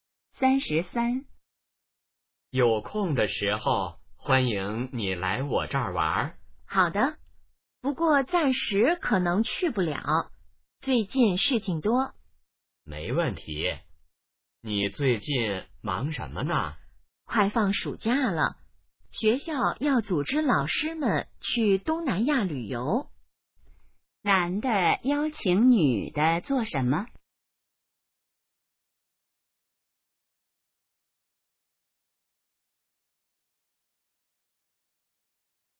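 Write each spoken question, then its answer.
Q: 男的邀请女的做什么?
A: 来他那儿玩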